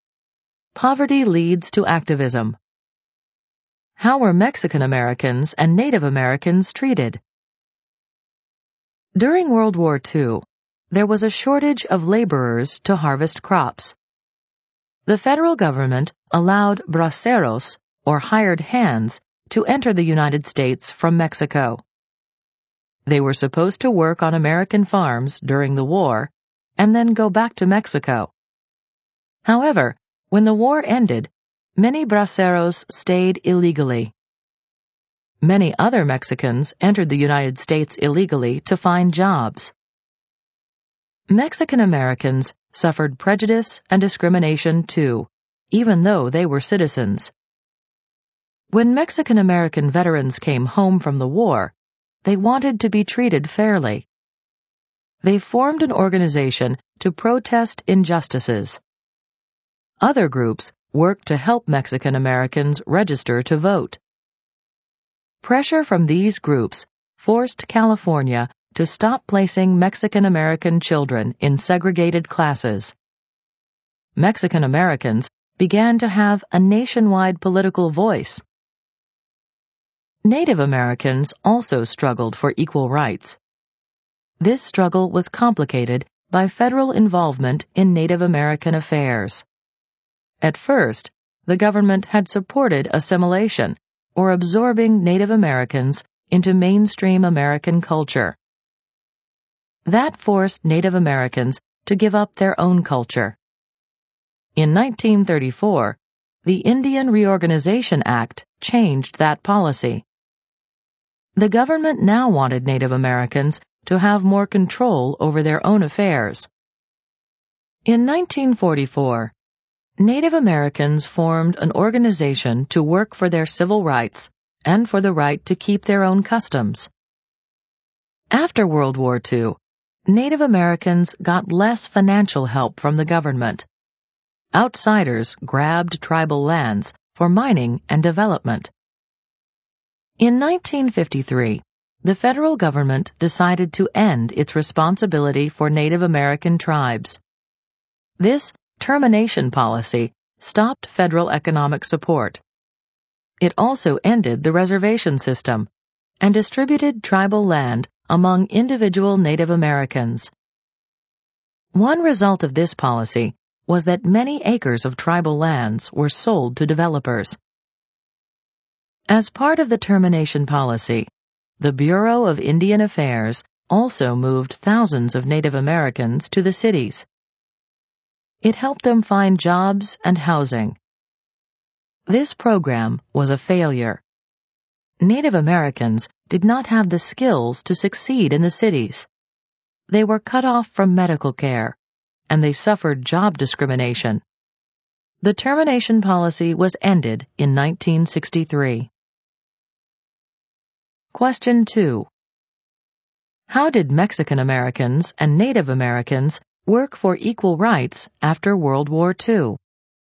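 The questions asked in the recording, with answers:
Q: How did Mexican Americans and Native Americans work for equal rights after World War II?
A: Mexican Americans formed organizations to protest injustices and help people register to vote, forcing California to end segregated classes; Native Americans formed an organization in 1944 to work for their civil rights and the right to keep their own customs.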